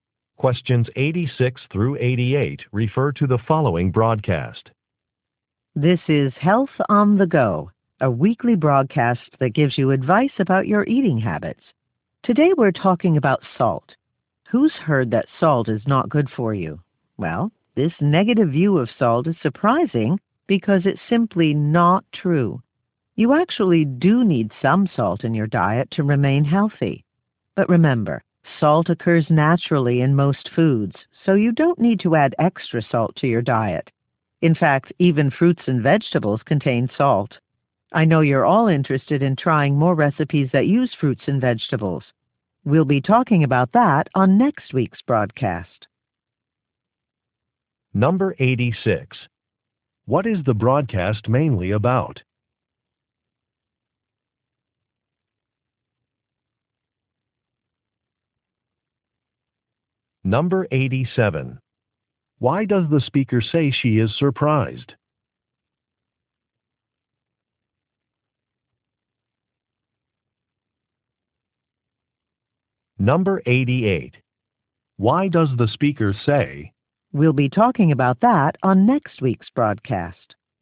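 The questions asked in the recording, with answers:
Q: What is the broadcast mainly about?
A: Salt in your diet

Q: Why does the speaker say she is surprised?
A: The negative view of salt is not true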